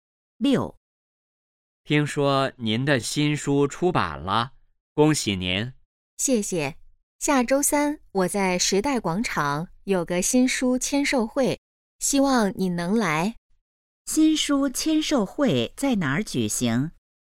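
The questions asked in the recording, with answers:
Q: 新书签售会在哪儿举行?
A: 时代广场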